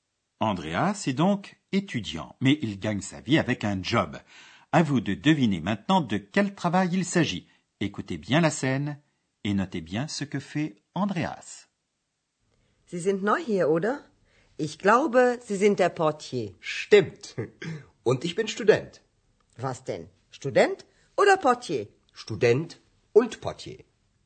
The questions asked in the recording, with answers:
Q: Écoutez bien la scène et notez bien ce que fait Andreas.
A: Il gagne sa vie comme réceptionniste, comme portier.